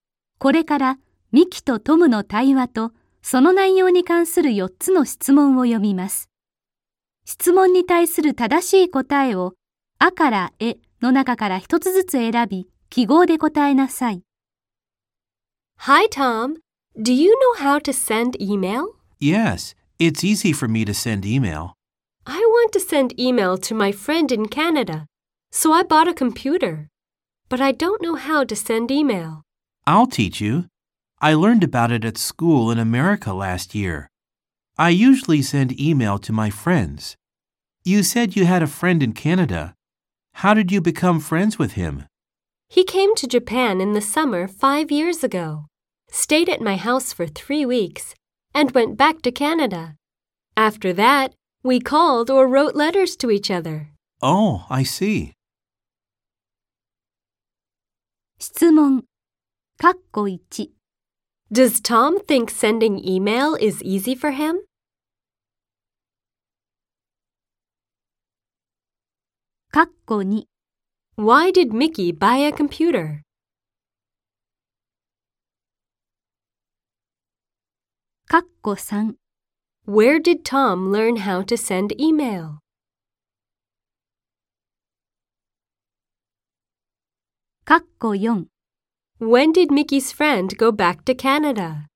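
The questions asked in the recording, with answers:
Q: Does Tom think sending email is easy for him?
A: Yes, he does.

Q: Why did Mickey buy a computer?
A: To send email to her friend in Canada.

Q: Where did Tom learn how to send email?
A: At school in America.

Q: When did Mickey's friend go back to Canada?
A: In the summer five years ago, after staying three weeks.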